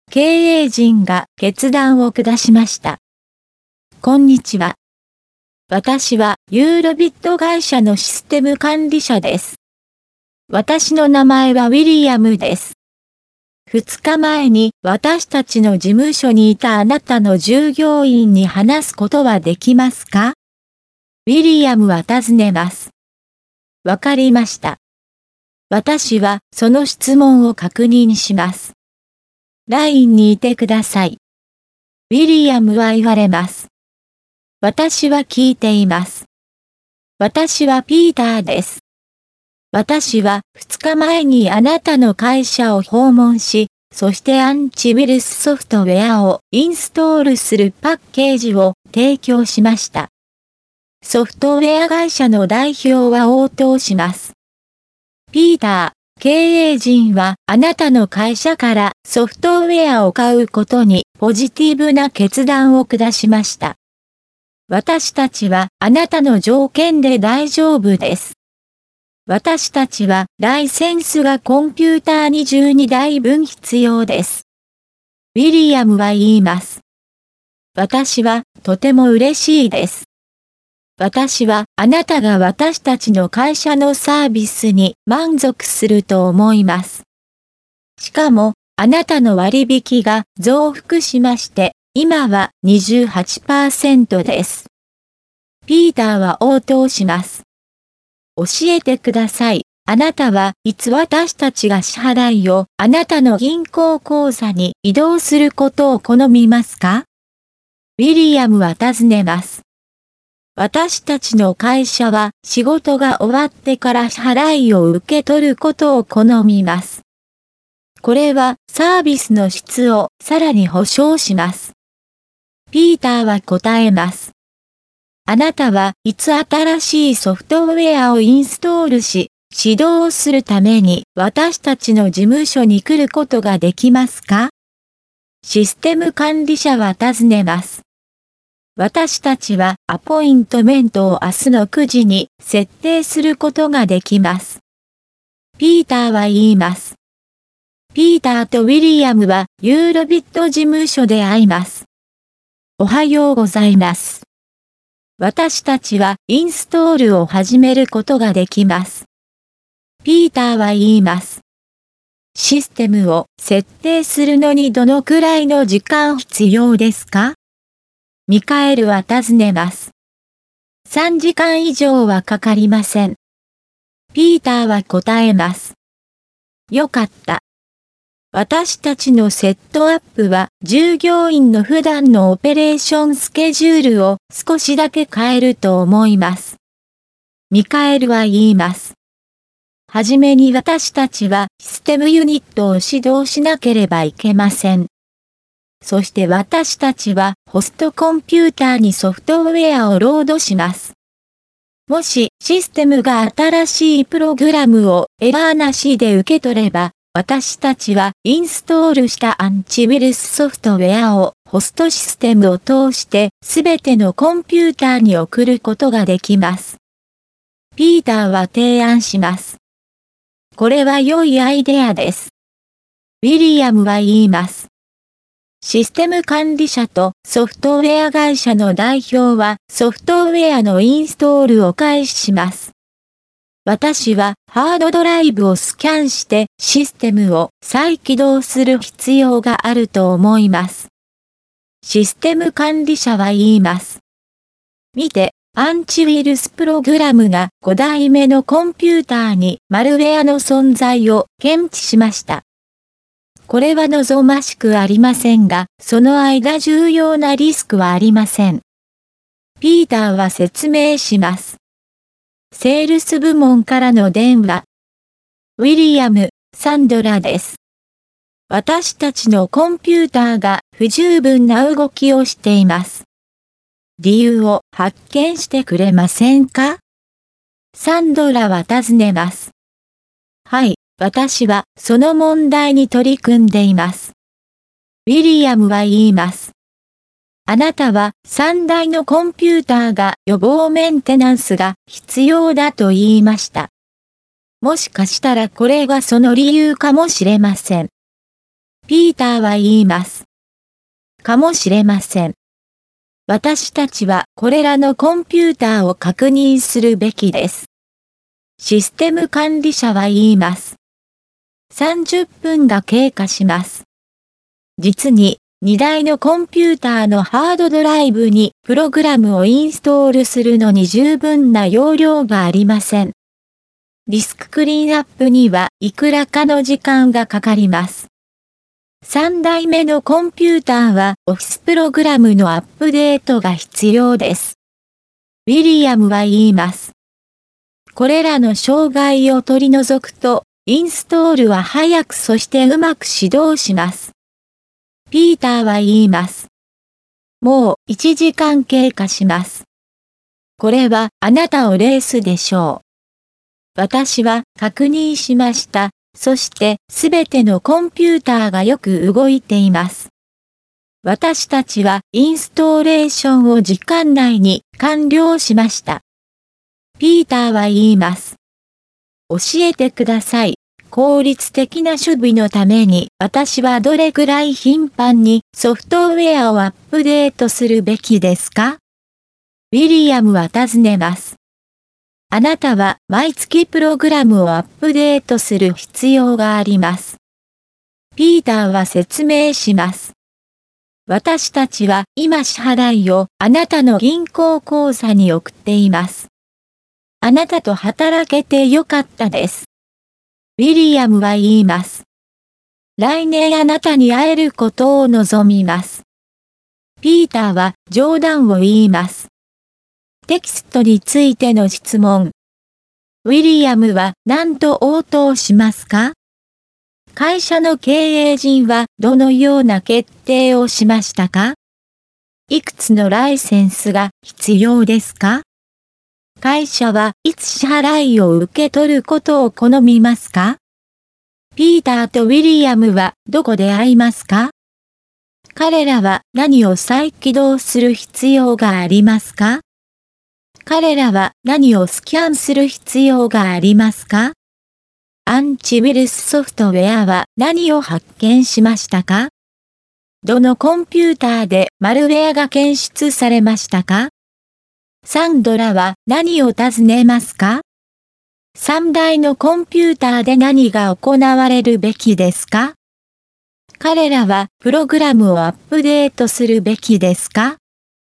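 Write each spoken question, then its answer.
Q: 会社の経営陣はどのような決定をしましたか?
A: ピーターの会社からソフトウェアを買うというポジティブな決断

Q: いくつのライセンスが必要ですか?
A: コンピューター22台分

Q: 会社はいつ支払いを受け取ることを好みますか?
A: 仕事が終わってから

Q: ピーターとウィリアムはどこで会いますか?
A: ユーロビット事務所

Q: 彼らは何を再起動する必要がありますか?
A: システム

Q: 彼らは何をスキャンする必要がありますか?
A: ハードドライブ

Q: アンチウイルスソフトウェアは何を発見しましたか?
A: マルウェア

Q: どのコンピューターでマルウェアが検出されましたか?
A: 5台目のコンピューター

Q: サンドラは何を尋ねますか?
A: コンピューターの動きが不十分な理由を調べてほしい

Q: 3台のコンピューターで何が行われるべきですか?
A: 予防メンテナンス

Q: 彼らはプログラムをアップデートするべきですか?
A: はい、毎月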